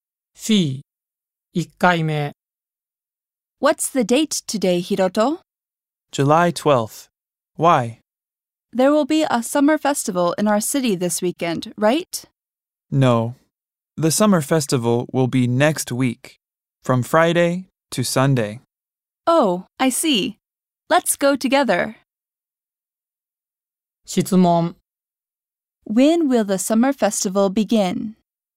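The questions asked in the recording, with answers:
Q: When will the summer festival begin?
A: Next Friday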